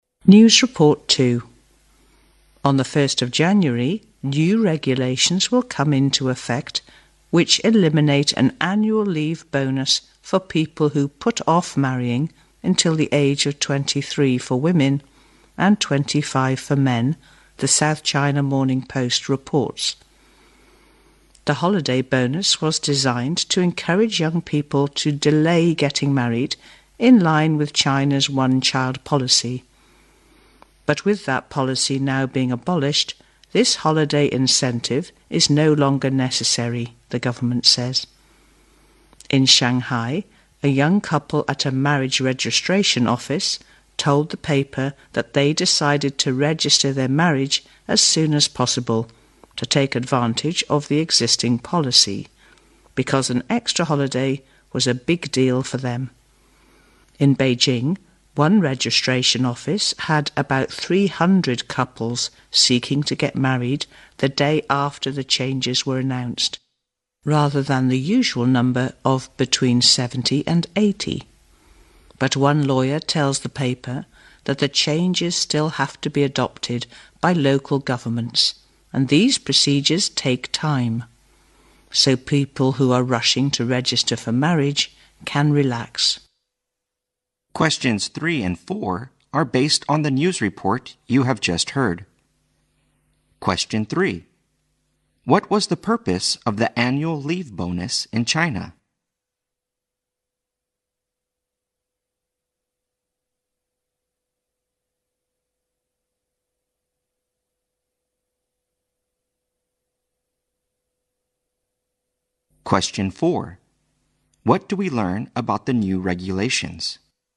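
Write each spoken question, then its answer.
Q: What was the purpose of the annual leave bonus in China?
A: To encourage young people to delay getting married, in line with the one-child policy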